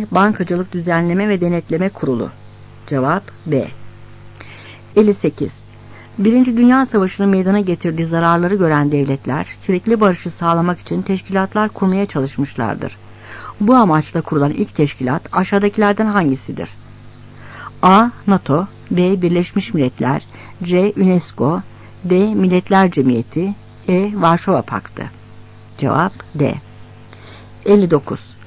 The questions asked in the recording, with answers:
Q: Bu amaçla kurulan ilk teşkilat aşağıdakilerden hangisidir?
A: Cevap D.